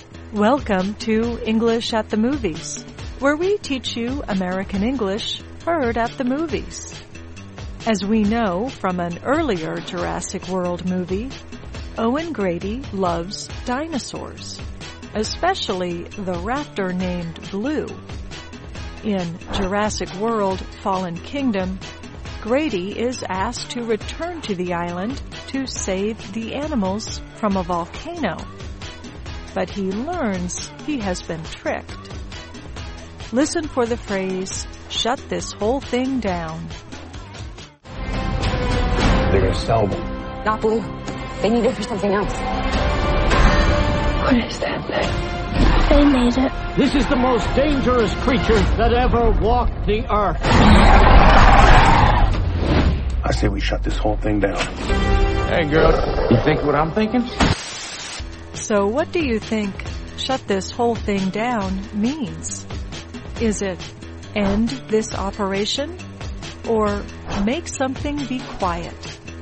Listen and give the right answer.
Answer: Shut this whole thing down means end this operation.